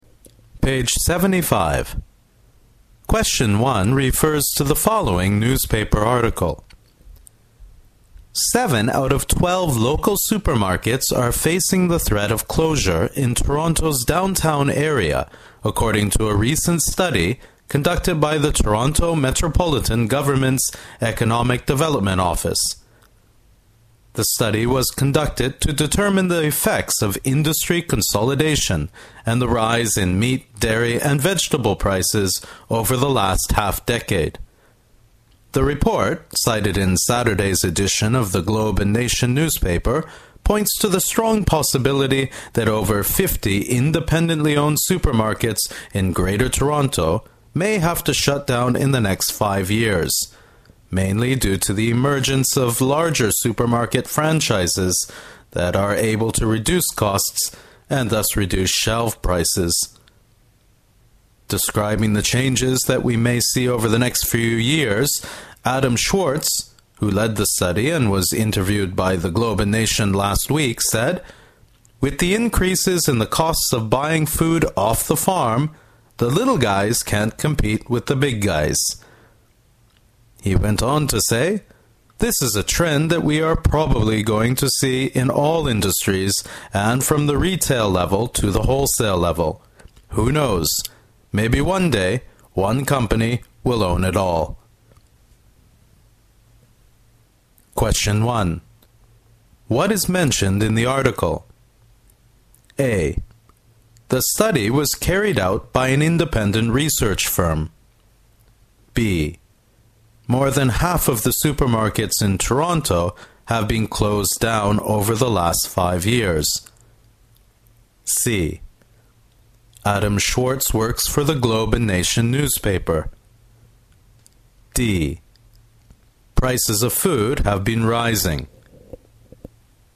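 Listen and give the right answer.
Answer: D: Prices of food have been rising.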